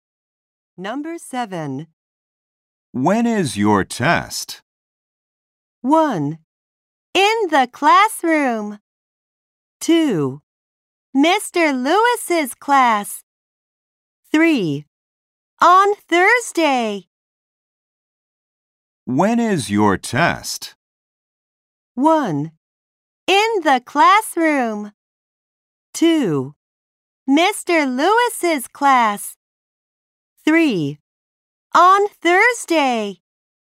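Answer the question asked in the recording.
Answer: 3: On Thursday.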